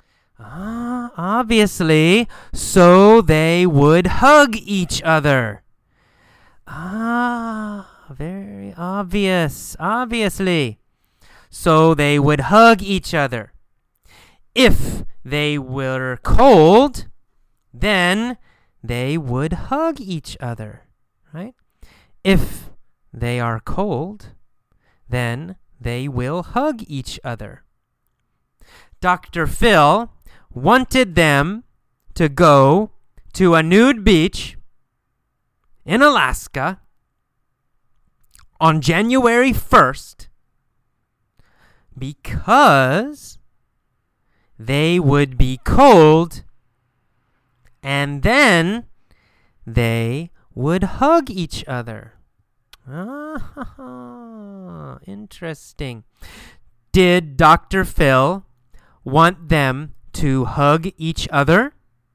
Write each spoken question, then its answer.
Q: Did Dr. Phil want them to hug each other?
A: Yes. Yes, he did.